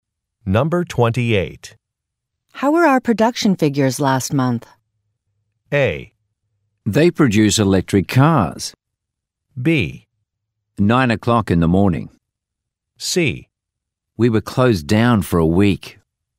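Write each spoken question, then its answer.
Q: How were our production figures last month?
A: C: We were closed down for a week.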